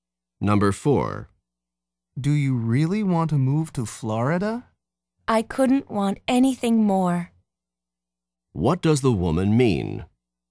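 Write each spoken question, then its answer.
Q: What does the woman mean?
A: She really wants to move to Florida.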